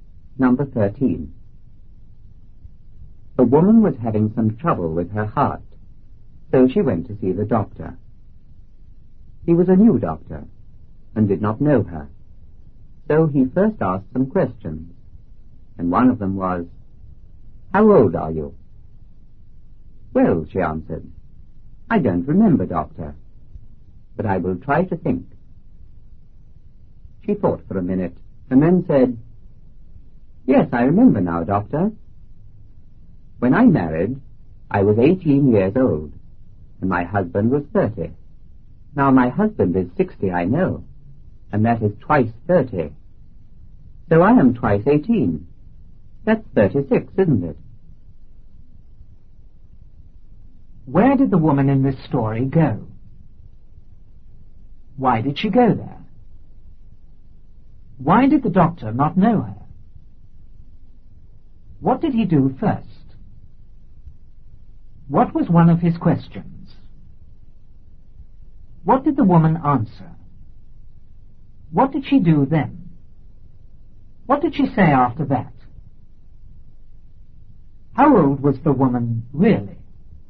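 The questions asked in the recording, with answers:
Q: Where did the woman in this story go?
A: To the doctor

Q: Why did she go there?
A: She was having some trouble with her heart

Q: Why did the doctor not know her?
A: He was a new doctor

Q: What did he do first?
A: He asked her some questions

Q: What was one of his questions?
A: How old are you?

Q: What did the woman answer?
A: She didn't remember but would try to think

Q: What did she do then?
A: She thought for a minute

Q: What did she say after that?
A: She was 18 when she married and her husband was 30; now he is 60, twice 30, so she is twice 18, 36

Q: How old was the woman really?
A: 48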